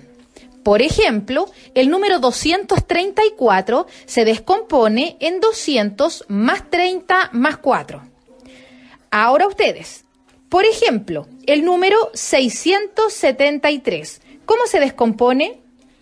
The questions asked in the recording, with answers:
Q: ¿Cómo se descompone?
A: 600 más 70 más 3.